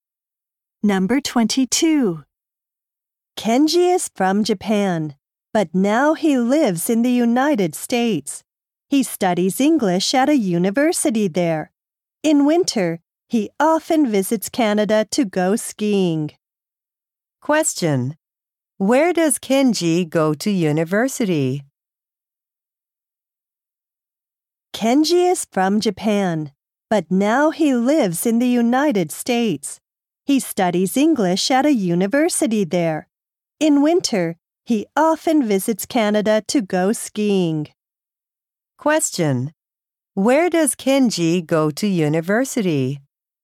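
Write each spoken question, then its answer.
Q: Where does Kenji go to university?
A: In the United States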